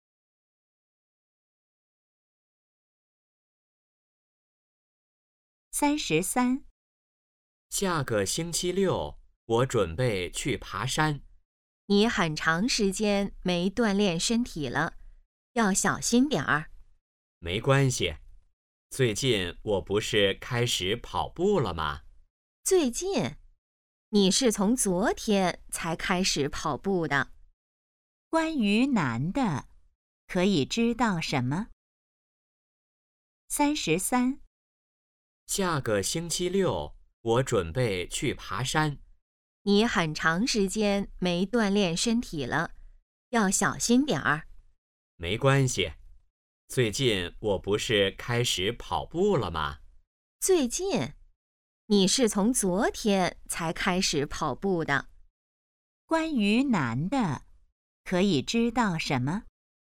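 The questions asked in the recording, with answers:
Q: 关于男的,可以知道什么?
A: 昨天才开始跑步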